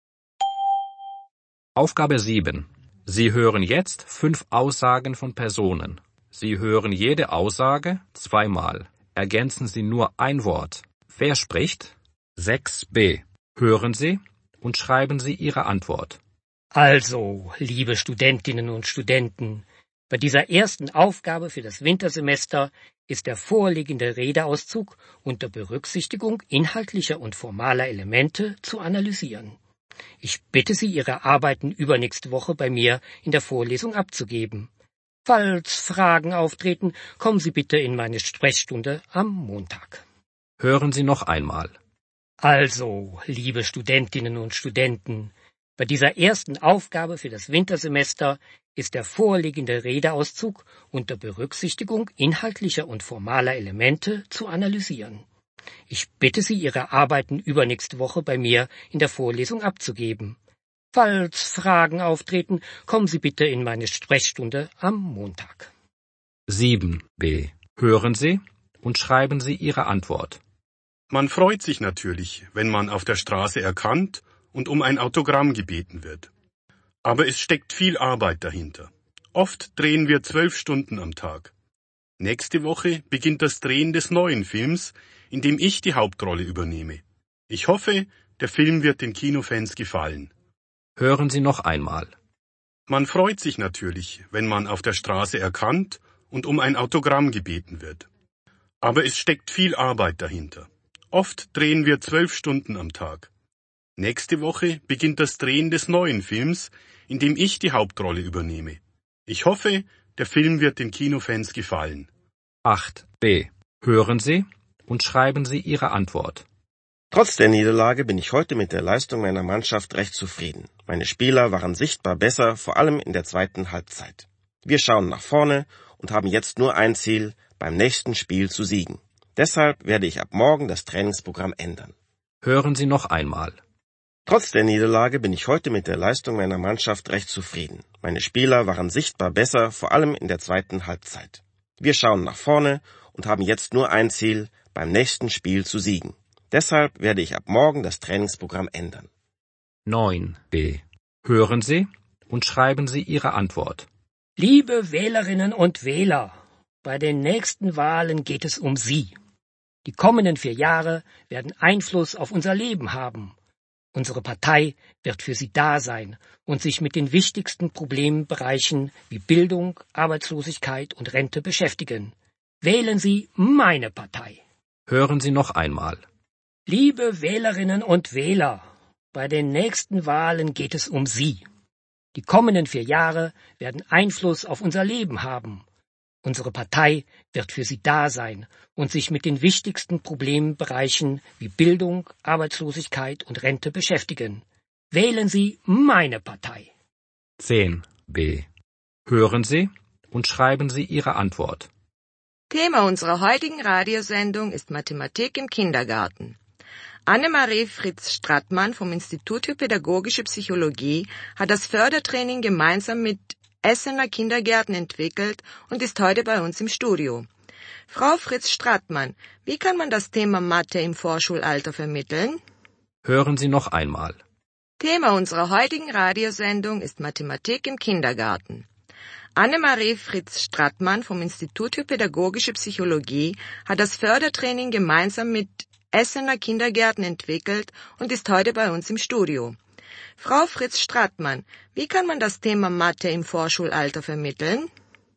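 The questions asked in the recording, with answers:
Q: Wer spricht?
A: ein Professor

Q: Wer spricht?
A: ein Schauspieler

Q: Wer spricht?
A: ein Trainer

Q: Wer spricht?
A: ein Politiker

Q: Wer spricht?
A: ein Moderator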